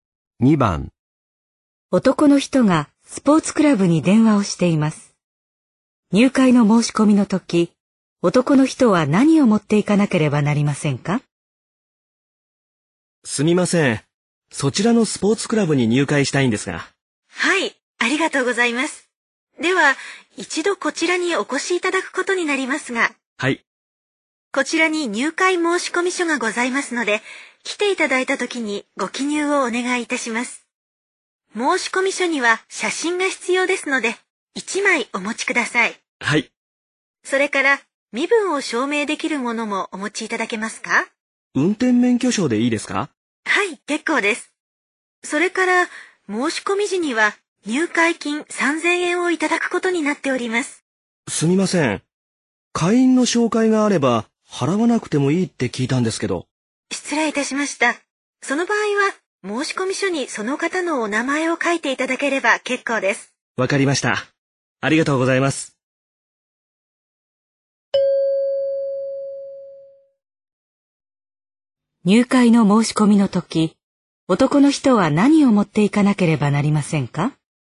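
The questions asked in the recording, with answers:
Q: 入会の申し込みの時、男の人は何を持っていかなければなりませんか?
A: 写真1枚と運転免許証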